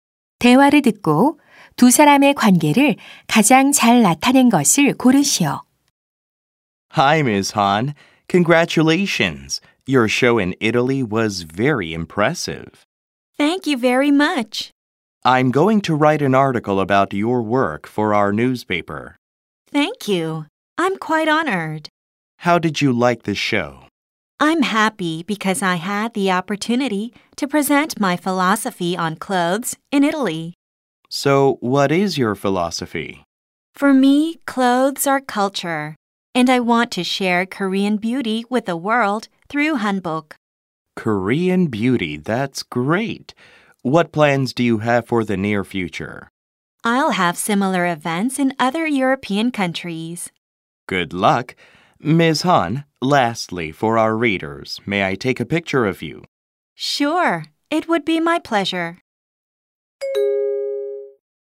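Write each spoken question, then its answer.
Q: 대화를 듣고 두 사람의 관계를 가장 잘 나타낸 것을 고르시오.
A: 신문 기자 - 한복 디자이너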